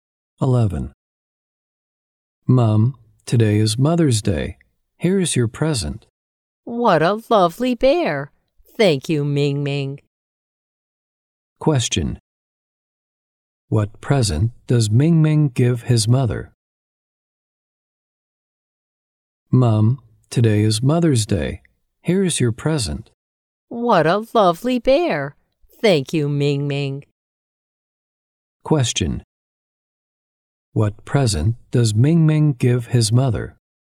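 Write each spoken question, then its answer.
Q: What present does Ming Ming give his mother?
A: A bear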